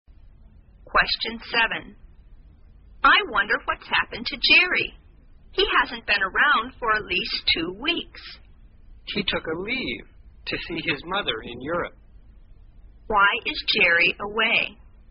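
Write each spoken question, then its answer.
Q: Why is Jerry away?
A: He took a leave to see his mother in Europe.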